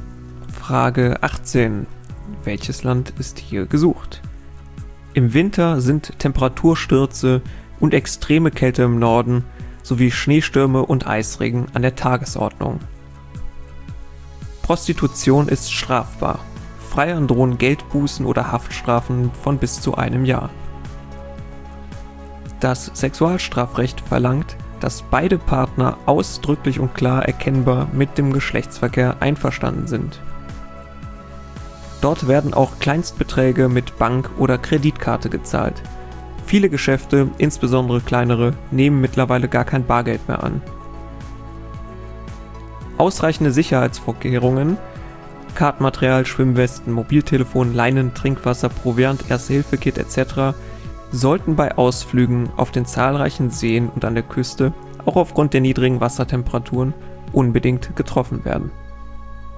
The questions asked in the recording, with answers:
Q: Welches Land ist hier gesucht?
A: Hier war Schweden gesucht.